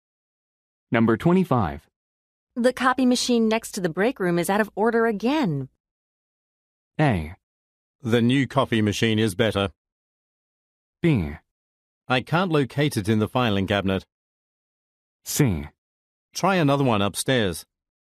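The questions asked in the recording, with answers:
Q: The copy machine next to the break room is out of order again.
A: C: Try another one upstairs.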